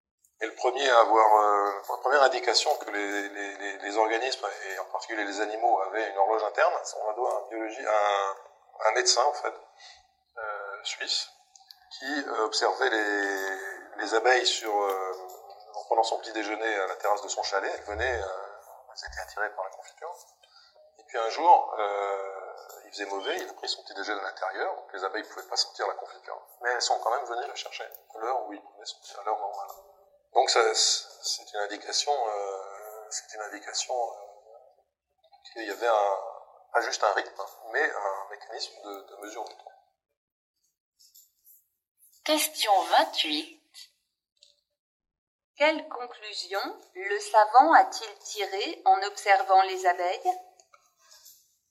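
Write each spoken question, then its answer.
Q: Quelle conclusion le savant a-t-il tirée en observant les abeilles?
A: Les animaux ont une horloge interne qui mesure le temps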